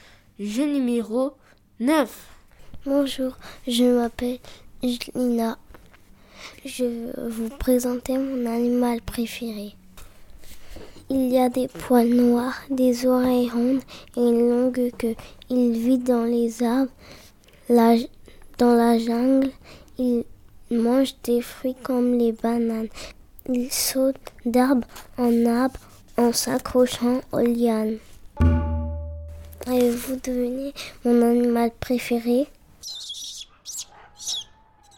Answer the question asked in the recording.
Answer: C'est le singe.